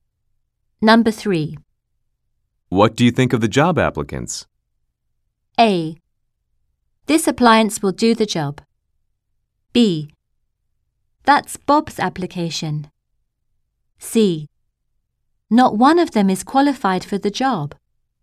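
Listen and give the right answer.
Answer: C: Not one of them is qualified for the job.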